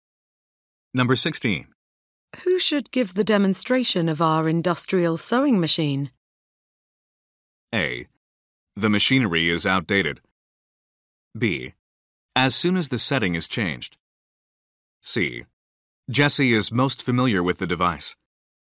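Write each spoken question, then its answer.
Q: Who should give the demonstration of our industrial sewing machine?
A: C: Jesse is most familiar with the device.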